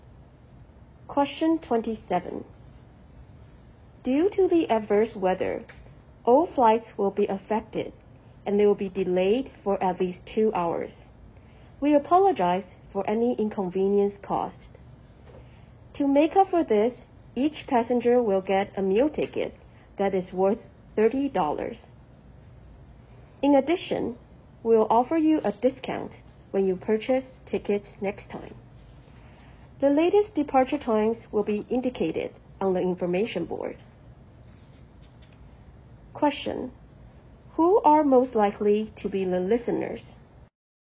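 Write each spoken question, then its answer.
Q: Who are most likely to be the listeners?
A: Airline passengers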